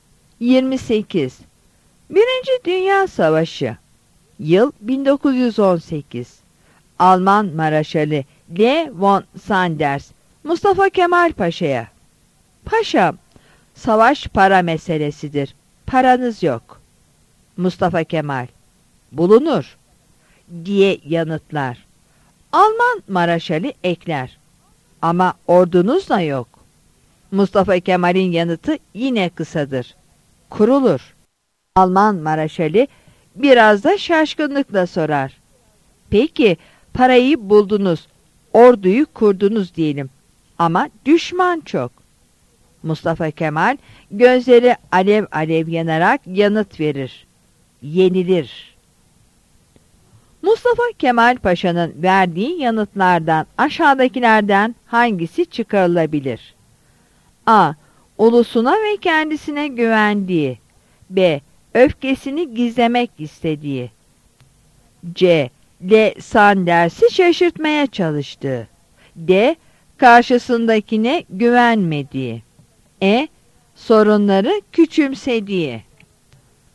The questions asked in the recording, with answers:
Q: Mustafa Kemal Paşa'nın verdiği yanıtlardan aşağıdakilerden hangisi çıkarılabilir?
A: Yanıt A'dır.